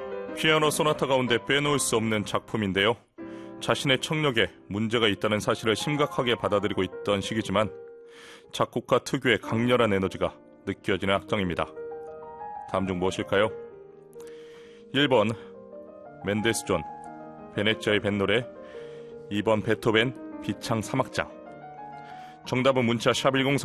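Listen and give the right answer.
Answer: 2번: 베토벤 비창 3악장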